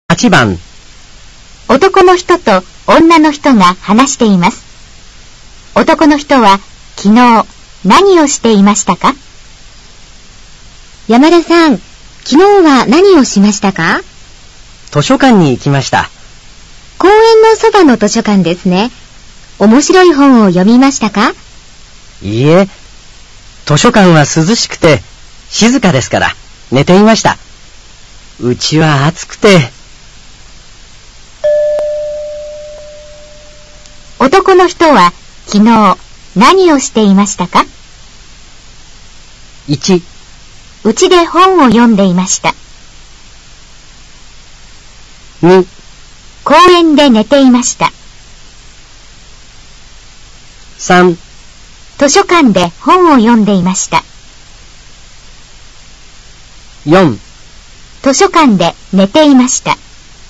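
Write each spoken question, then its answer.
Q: 男の人は昨日何をしていましたか?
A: 4: 図書館で寝ていました。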